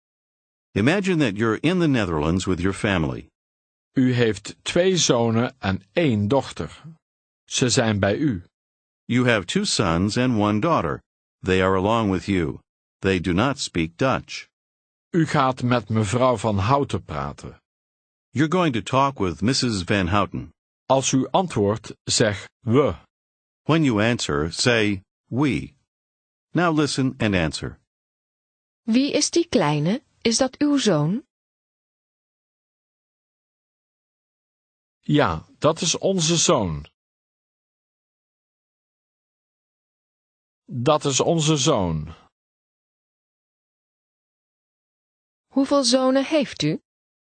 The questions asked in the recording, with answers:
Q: Hoeveel zonen heeft u?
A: We hebben 2 zonen.